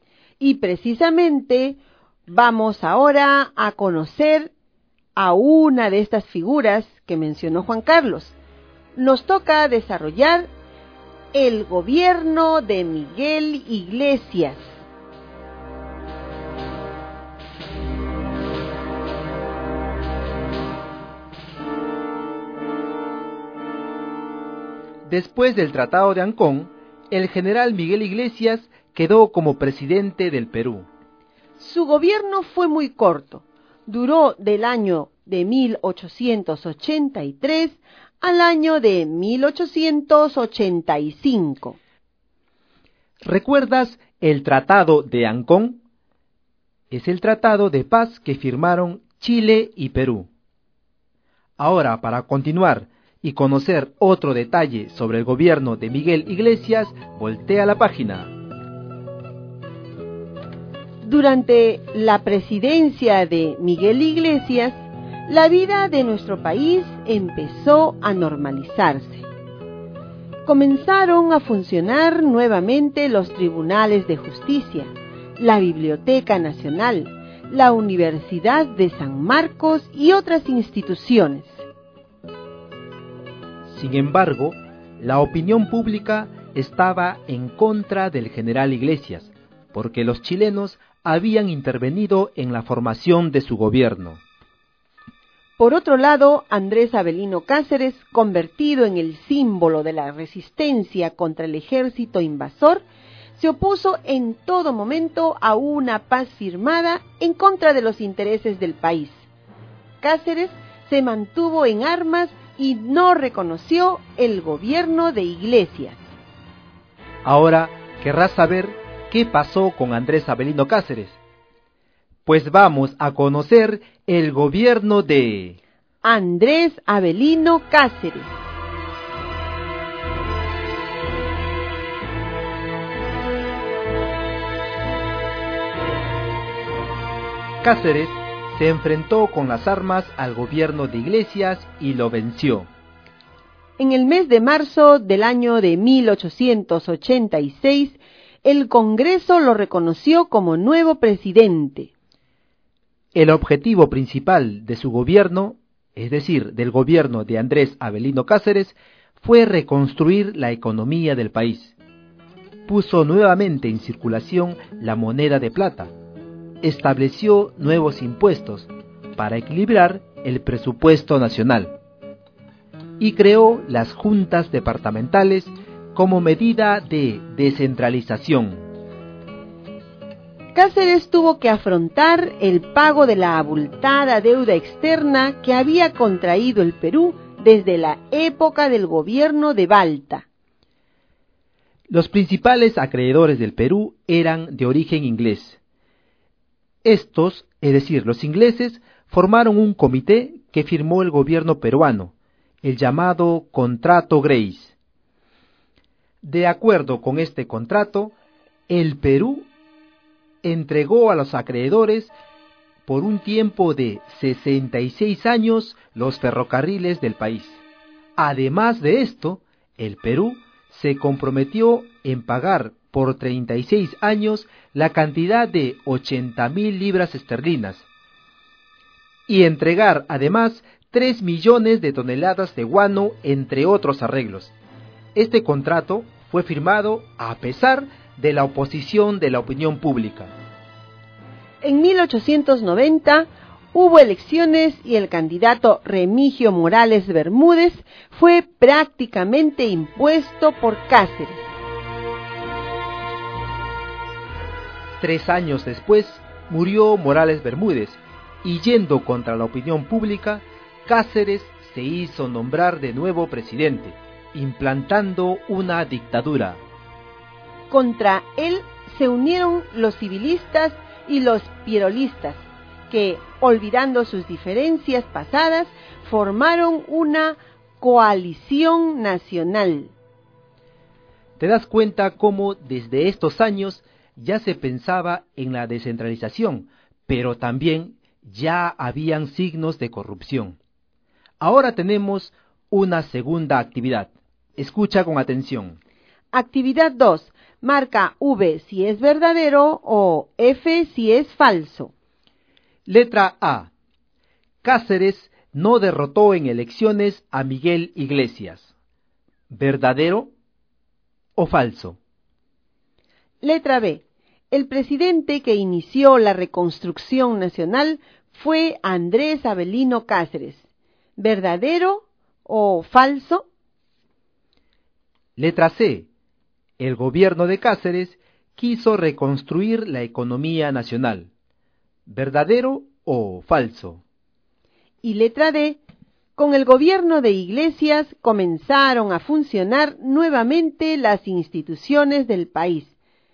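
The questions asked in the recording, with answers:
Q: Letra A. Cáceres no derrotó en elecciones a Miguel Iglesias.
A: Verdadero

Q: Letra C. El gobierno de Cáceres quiso reconstruir la economía nacional.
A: Verdadero

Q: Y letra D. Con el gobierno de Iglesias comenzaron a funcionar nuevamente las instituciones del país.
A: Verdadero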